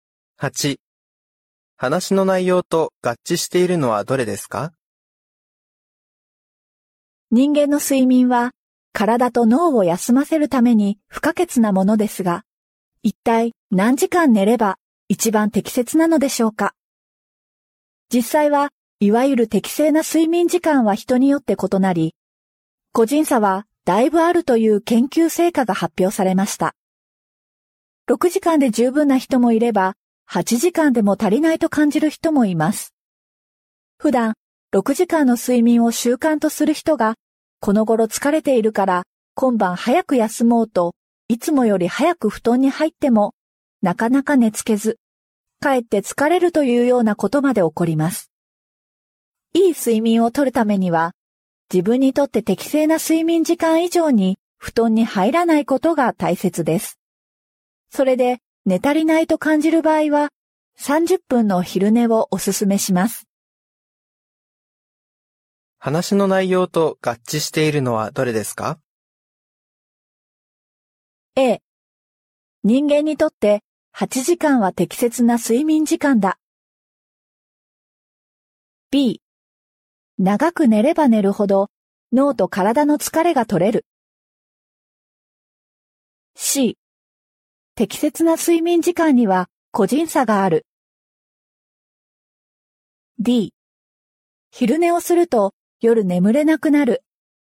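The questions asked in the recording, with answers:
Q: 話の内容と合致しているのはどれですか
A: C 適切な睡眠時間には個人差がある。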